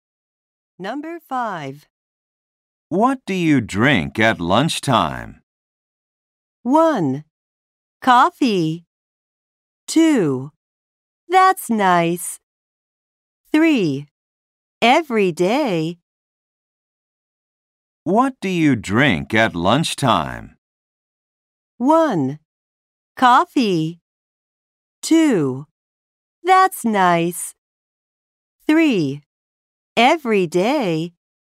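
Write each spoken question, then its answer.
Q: What do you drink at lunchtime?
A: 1: Coffee.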